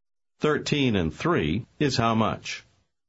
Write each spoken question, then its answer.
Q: 13 and 3 is how much?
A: 16.